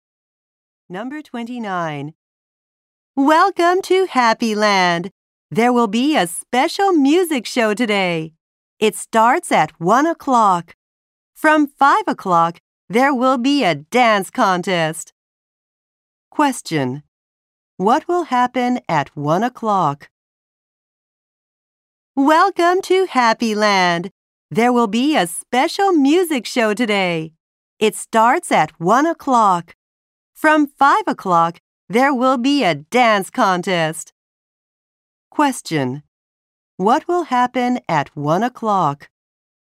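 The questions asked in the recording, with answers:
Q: What will happen at 1 o'clock?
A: A special music show will start.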